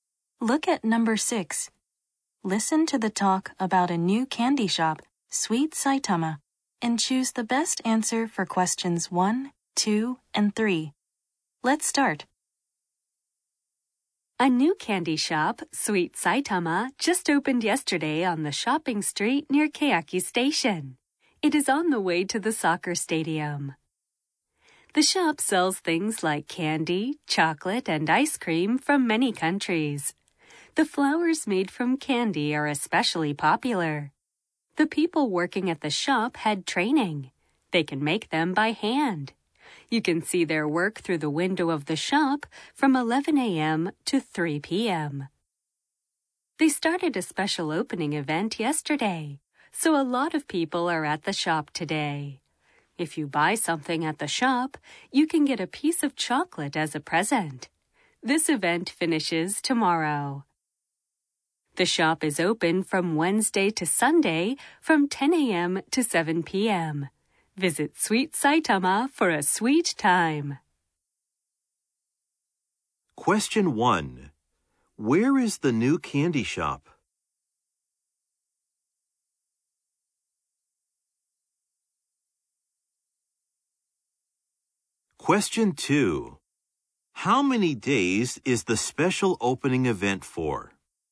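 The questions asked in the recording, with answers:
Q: Where is the new candy shop?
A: On the shopping street near Keyaki Station.

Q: How many days is the special opening event for?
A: Three days.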